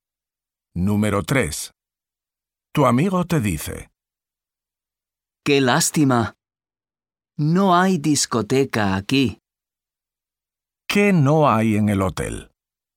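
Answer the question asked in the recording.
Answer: Discoteca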